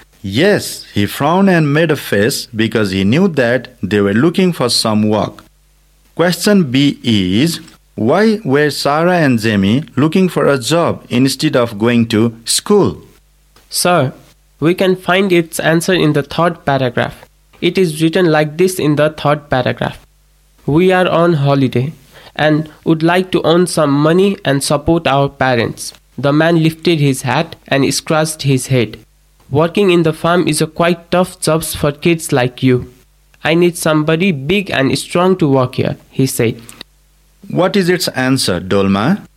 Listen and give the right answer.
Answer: Its answer is, because they were on holiday and would like to earn some money to support their parents.